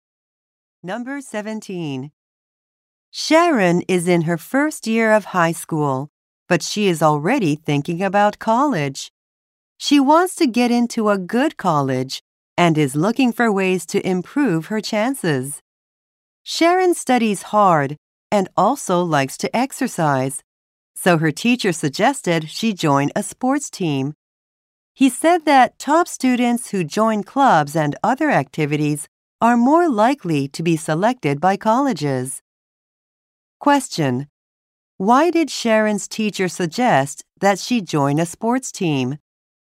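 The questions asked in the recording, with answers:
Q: Why did Sharon's teacher suggest that she join a sports team?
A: To improve her chances of being selected by colleges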